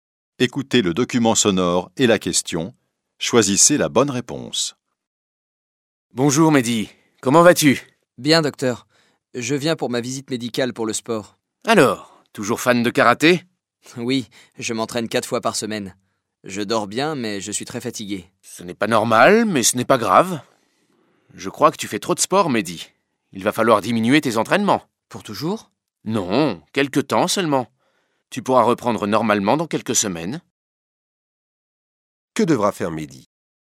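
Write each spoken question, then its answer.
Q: Que devra faire Mehdi?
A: Diminuer ses entraînements de karaté pendant quelques semaines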